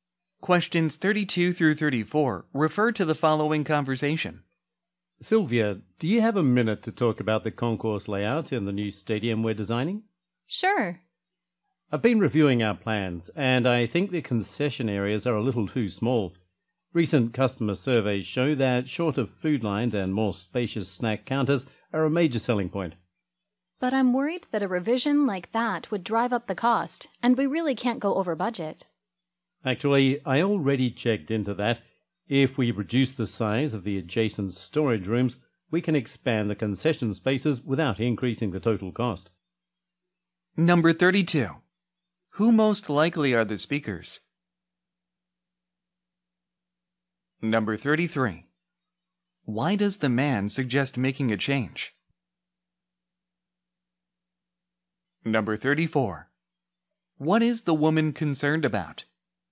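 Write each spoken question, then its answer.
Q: Who most likely are the speakers?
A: Stadium designers

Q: Why does the man suggest making a change?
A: Customer surveys show larger snack counters and shorter food lines are a major selling point

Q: What is the woman concerned about?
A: Going over budget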